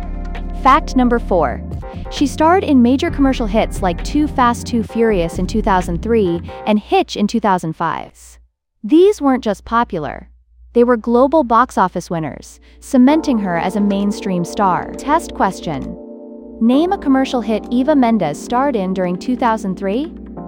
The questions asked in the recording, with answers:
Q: Name a commercial hit Eva Mendes starred in during 2003?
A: Correct answer. Too Fast, Too Furious.